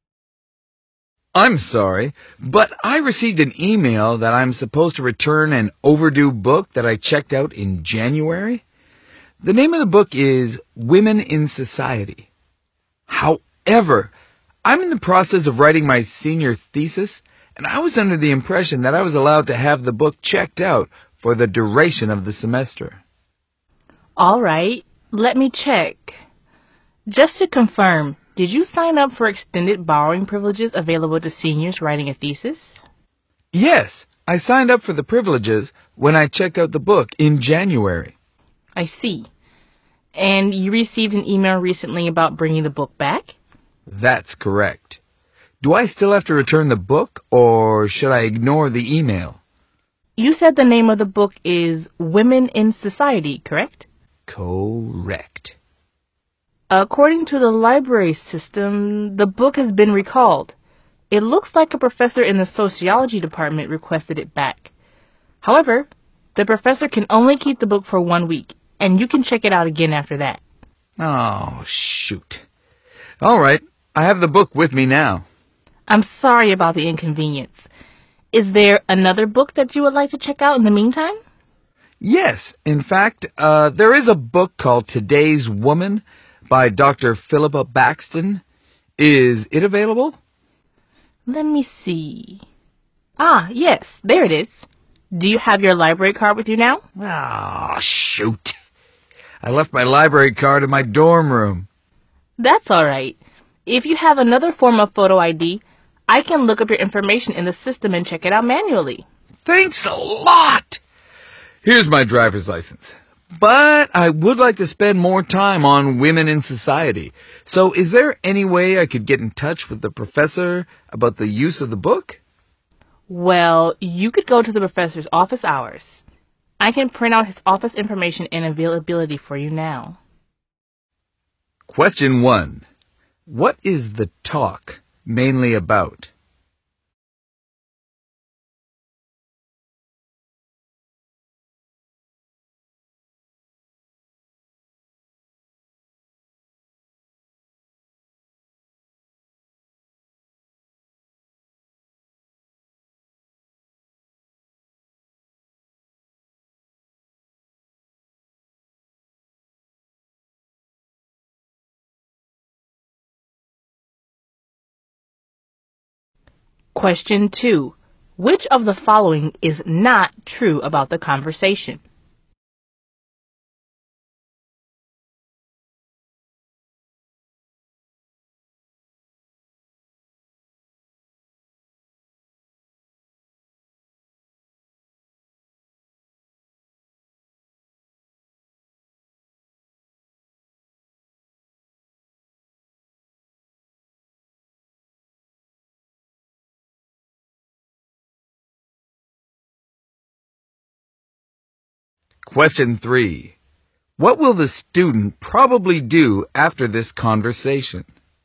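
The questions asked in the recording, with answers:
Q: What is the talk mainly about?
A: A student being asked to return a book that was recalled by a professor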